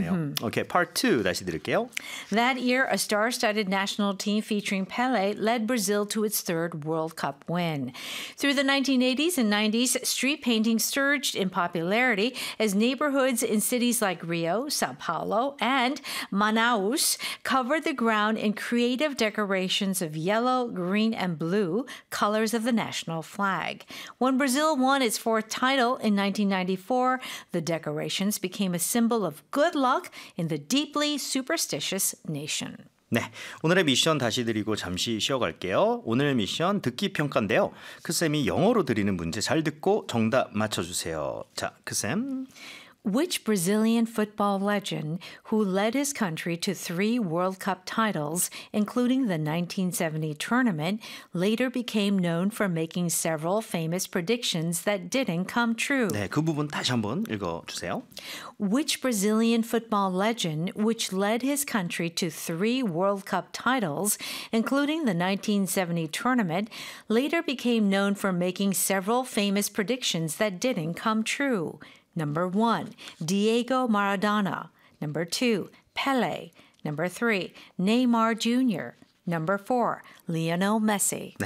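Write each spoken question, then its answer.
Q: Which Brazilian football legend who led his country to three World Cup titles, including the 1970 tournament, later became known for making several famous predictions that didn't come true?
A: 2: Pele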